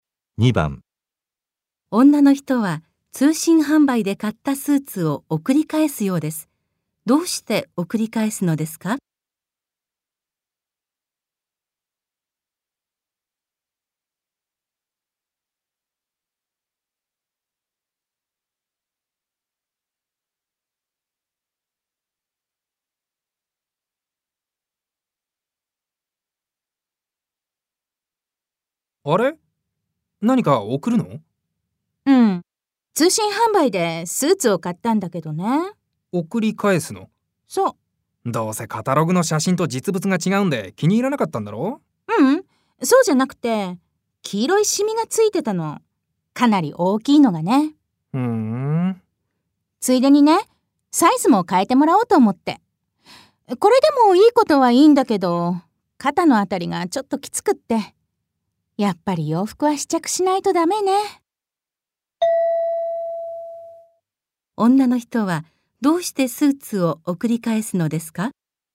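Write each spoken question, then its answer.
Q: 女の人はどうしてスーツを送り返すのですか?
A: 黄色いシミがついていたから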